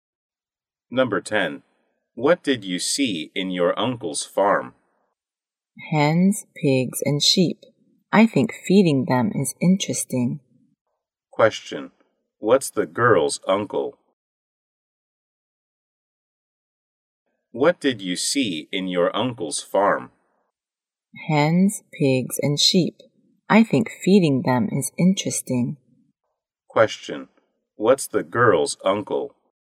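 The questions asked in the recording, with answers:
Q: What's the girl's uncle?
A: A farmer.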